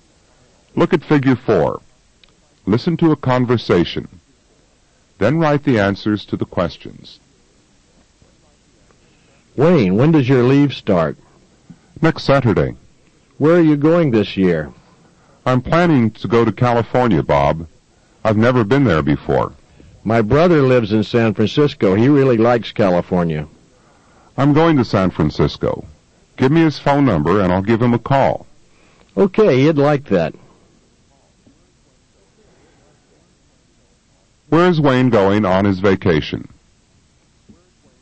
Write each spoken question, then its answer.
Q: Where is Wayne going on his vacation?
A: He's going to California.